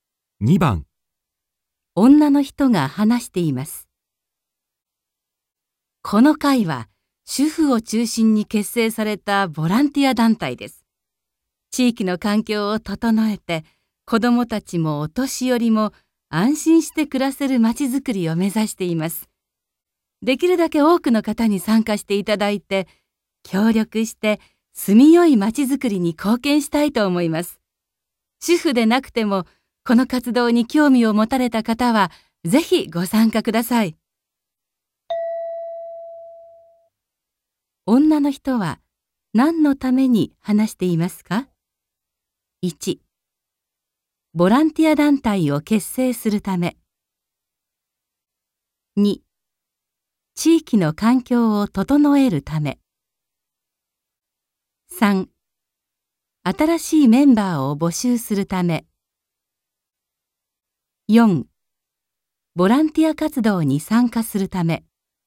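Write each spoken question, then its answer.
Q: 女の人は、何のために話していますか ?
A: 3: 新しいメンバーを募集するため。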